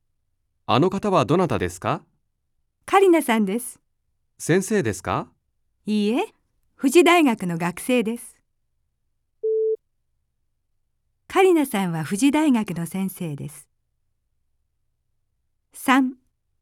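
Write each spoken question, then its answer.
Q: カリナさんは富士大学の先生です。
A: ×(富士大学の学生です)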